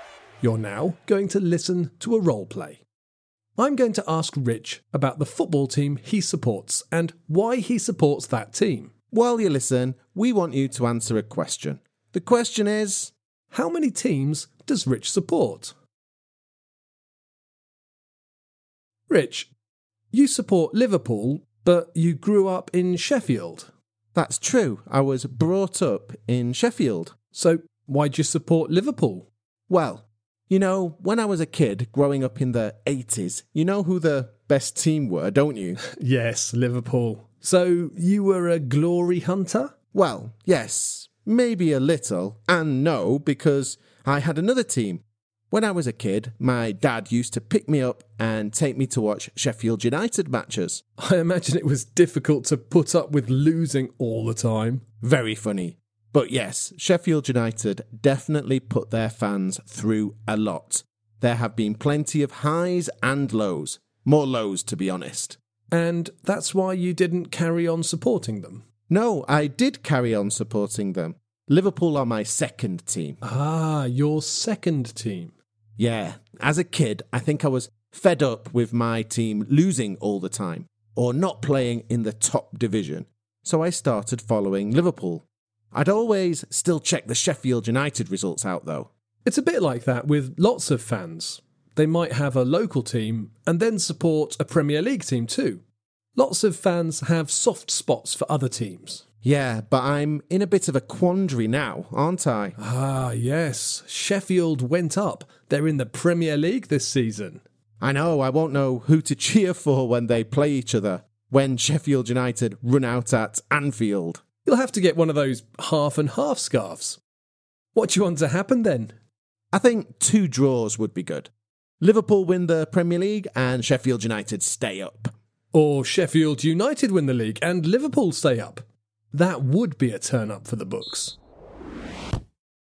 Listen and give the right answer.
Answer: Well, the answer is two. I support my hometown team, Sheffield United, and Liverpool.